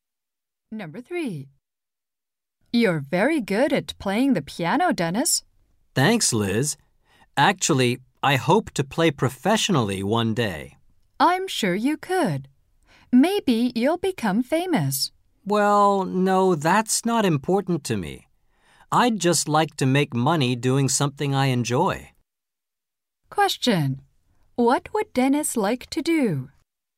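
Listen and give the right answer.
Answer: Make money playing the piano professionally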